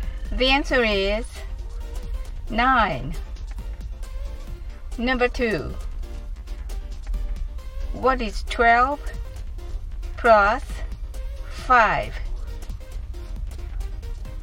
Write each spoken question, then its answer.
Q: What is 12 plus 5?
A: The answer is 17.